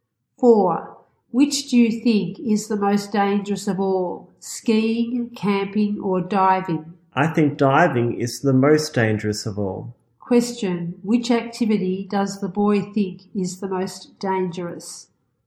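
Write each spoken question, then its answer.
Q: Which activity does the boy think is the most dangerous?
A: Diving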